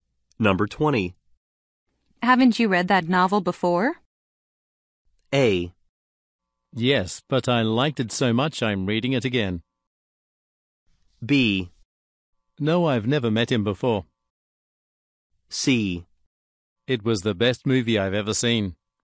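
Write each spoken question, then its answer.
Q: Haven't you read that novel before?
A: A: Yes, but I liked it so much I'm reading it again.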